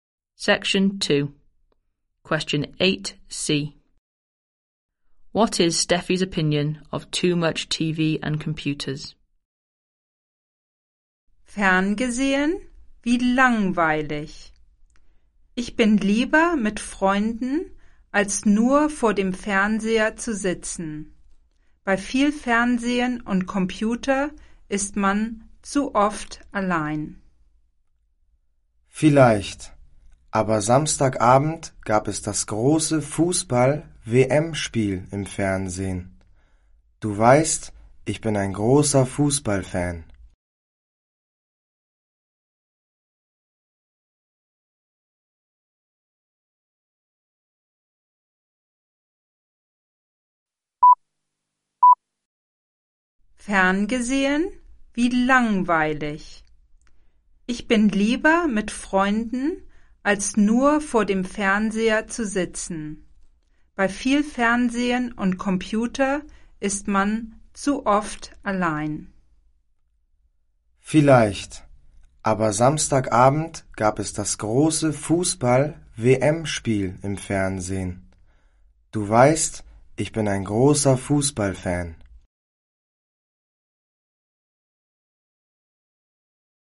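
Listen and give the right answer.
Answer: You are alone too often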